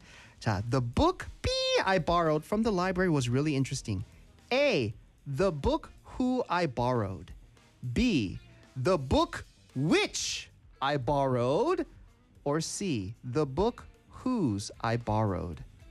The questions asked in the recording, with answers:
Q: 자, the book B I borrowed from the library was really interesting.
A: 2번 which요.